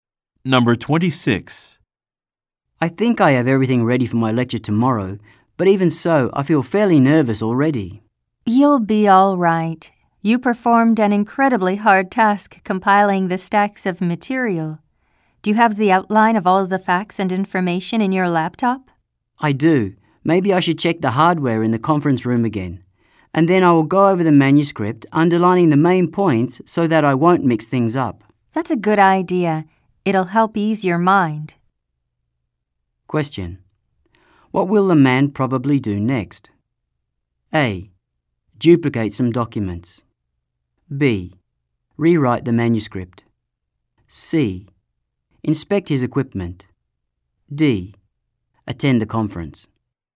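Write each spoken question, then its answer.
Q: What will the man probably do next?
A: C: Inspect his equipment.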